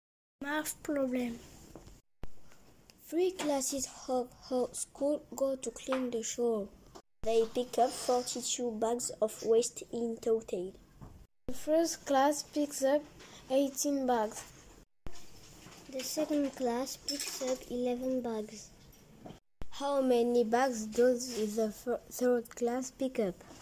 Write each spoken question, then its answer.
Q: How many bags does the third class pick up?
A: The third class picks up 13 bags.